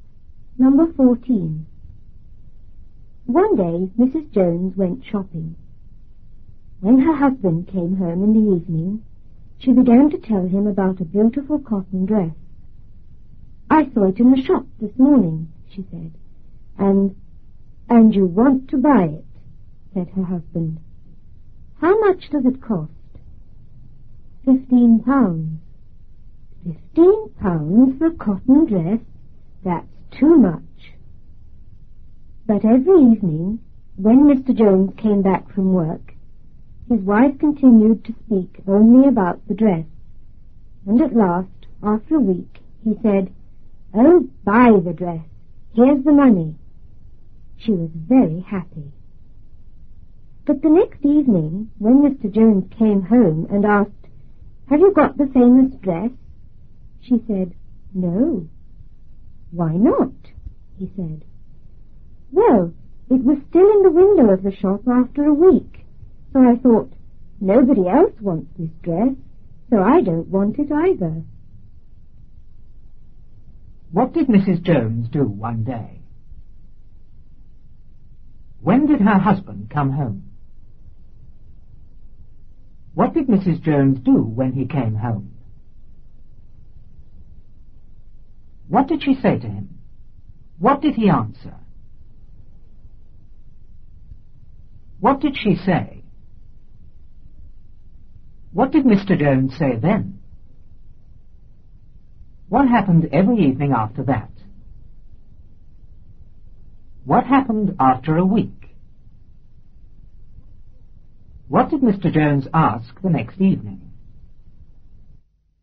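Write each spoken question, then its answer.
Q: What did Mrs. Jones do one day?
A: She went shopping.

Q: When did her husband come home?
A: In the evening.

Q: What did Mrs. Jones do when he came home?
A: She began to tell him about a beautiful cotton dress.

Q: What did she say to him?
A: "I saw it in the shop this morning."

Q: What did he answer?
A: "And you want to buy it. How much does it cost?"

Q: What did she say?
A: £15.

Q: What did Mr. Jones say then?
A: £15 for a cotton dress? That's too much.

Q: What happened every evening after that?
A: His wife kept talking only about the dress.

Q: What happened after a week?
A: He told her to buy the dress and gave her the money.

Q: What did Mr. Jones ask the next evening?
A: "Have you got the famous dress?"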